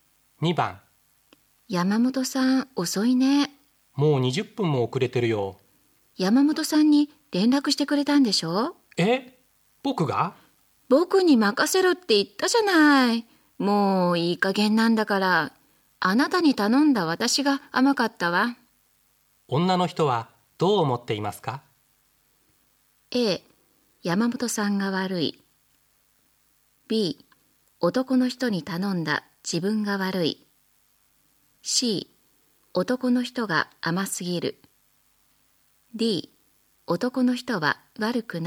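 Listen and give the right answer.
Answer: B: 男の人に頼んだ自分が悪い。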